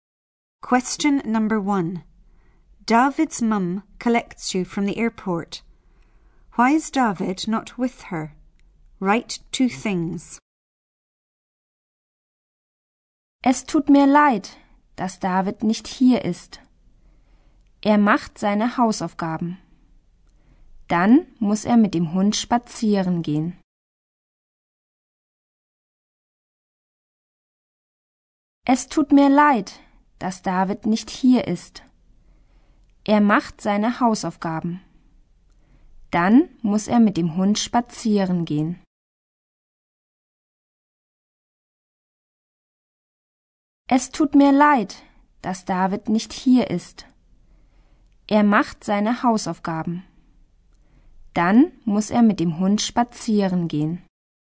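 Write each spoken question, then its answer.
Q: Why is David not with her?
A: He is doing his homework, then he has to walk the dog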